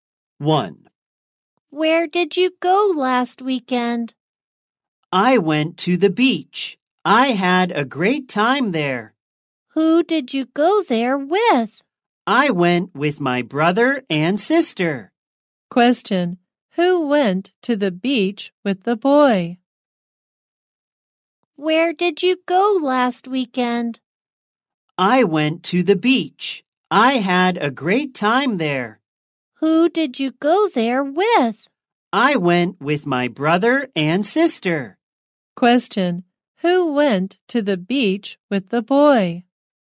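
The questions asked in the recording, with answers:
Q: Question, who went to the beach with the boy?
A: His brother and sister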